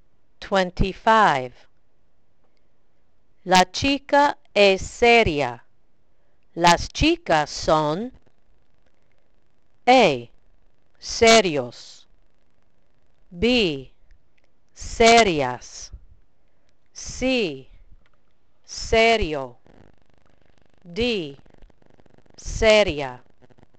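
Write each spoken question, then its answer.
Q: La chica es seria. Las chicas son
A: B: serias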